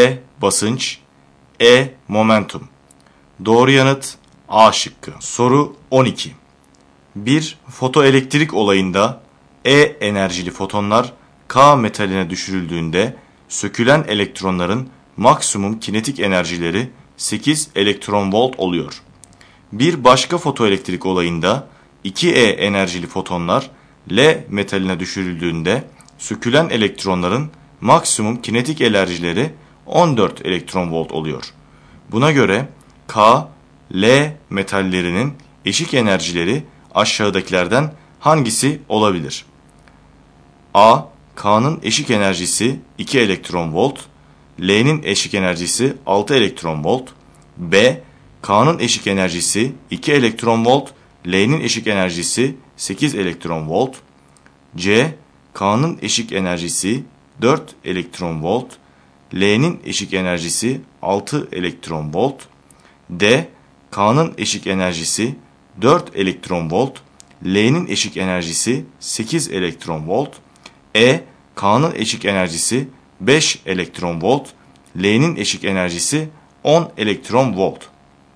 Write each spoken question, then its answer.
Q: Buna göre K, L metallerinin eşik enerjileri aşağıdakilerden hangisi olabilir?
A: Doğru yanıt A şıkkı.